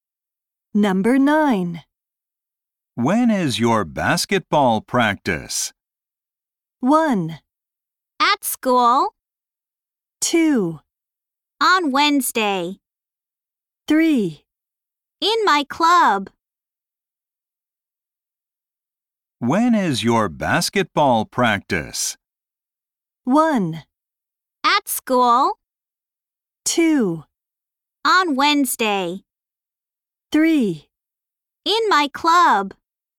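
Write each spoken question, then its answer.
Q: When is your basketball practice?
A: 2: On Wednesday.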